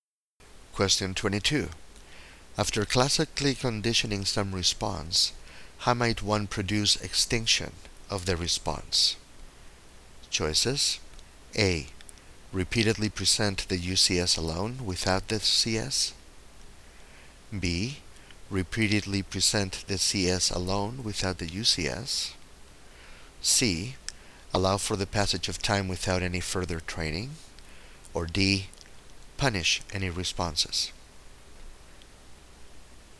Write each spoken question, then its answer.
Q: After classically conditioning some response, how might one produce extinction of the response?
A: The correct choice here is B.